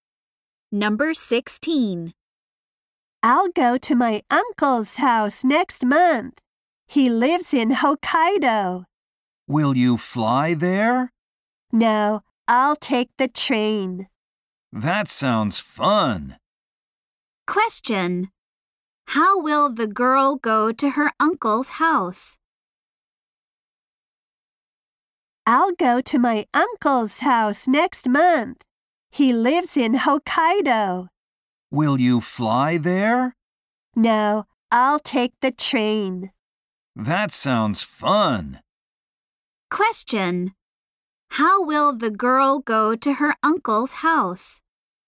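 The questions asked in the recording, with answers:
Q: How will the girl go to her uncle's house?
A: By train.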